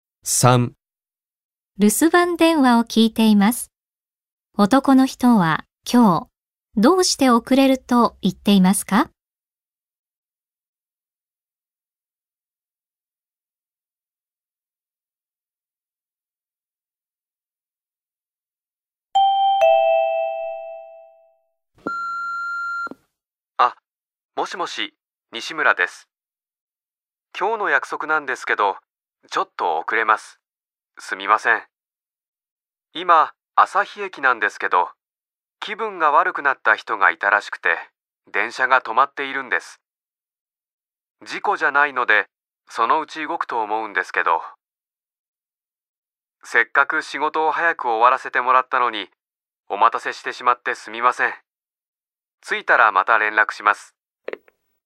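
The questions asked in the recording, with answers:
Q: 男の人は今日、どうして遅れると言っていますか?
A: 気分が悪くなった人がいて、電車が止まっているから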